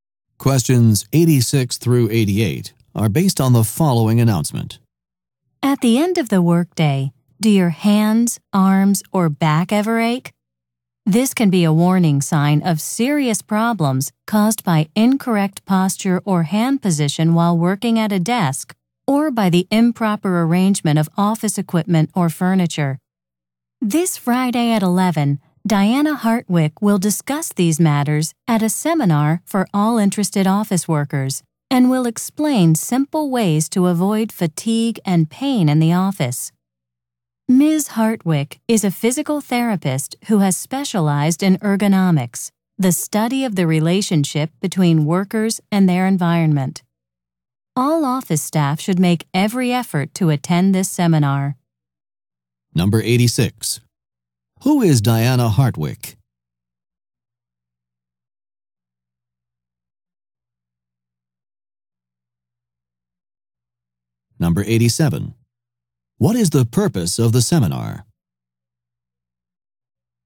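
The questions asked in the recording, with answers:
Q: Who is Diana Hartwick?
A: A physical therapist specializing in ergonomics

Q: What is the purpose of the seminar?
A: To explain how to avoid fatigue and pain in the office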